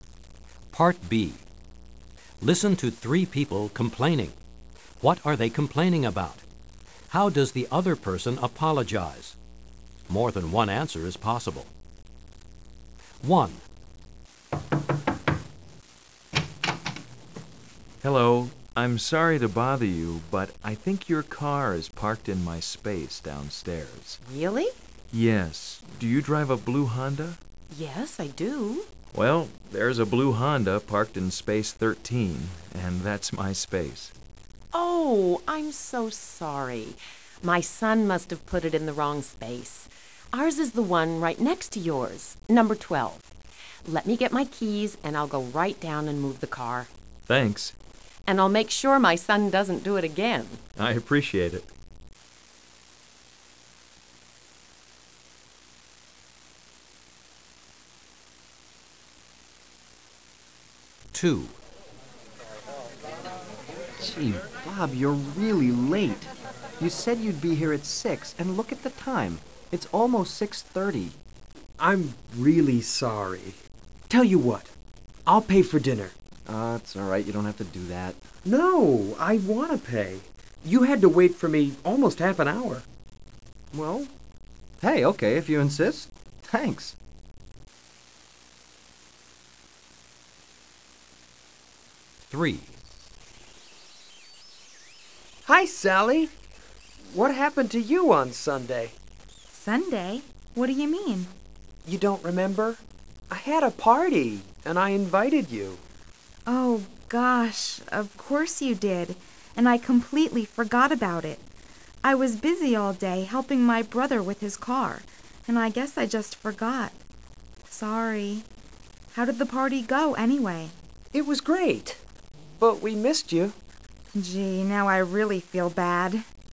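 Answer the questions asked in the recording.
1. The other person's car is parked in their parking space.
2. Says sorry, offers to move the car right away, and promises their son won't do it again.
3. Bob arrived almost half an hour late.
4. Says he's really sorry and offers to pay for dinner.
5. Sally forgot to come to the party on Sunday.
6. Says sorry, explains she was busy helping her brother with his car, and asks how the party went.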